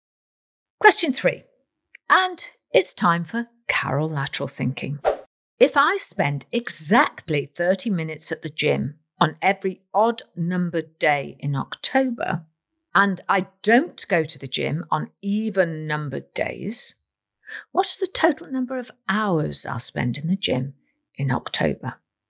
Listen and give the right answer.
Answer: The answer is 8 hours.